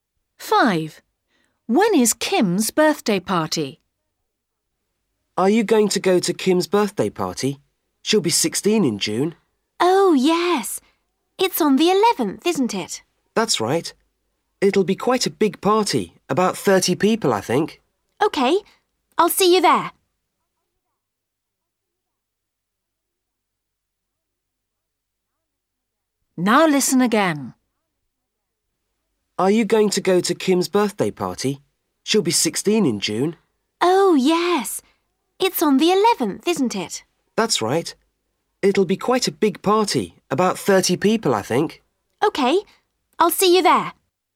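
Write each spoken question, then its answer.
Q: When is Kim's birthday party?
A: 11th June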